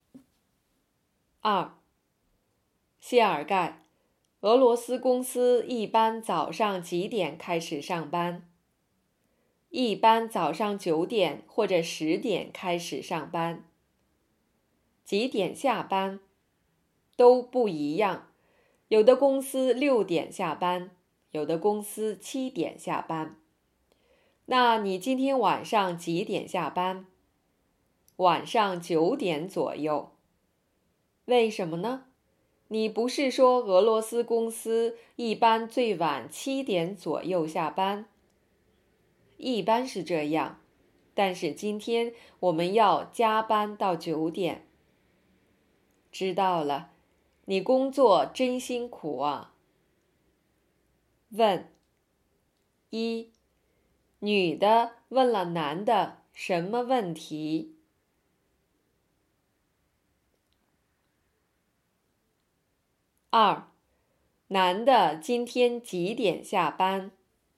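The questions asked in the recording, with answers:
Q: 男的今天几点下班?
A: 晚上9点左右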